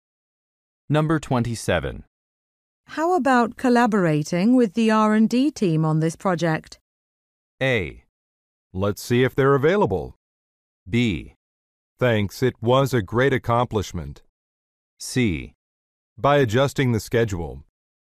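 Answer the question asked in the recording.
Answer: A: Let's see if they're available.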